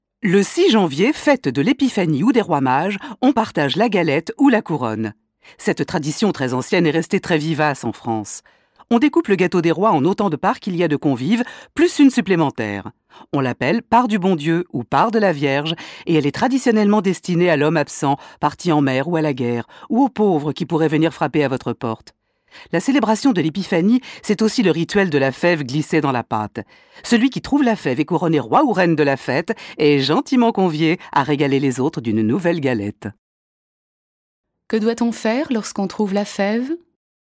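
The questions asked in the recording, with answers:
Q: Que doit-on faire lorsqu'on trouve la fève ?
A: On est couronné roi ou reine et on offre une nouvelle galette aux autres.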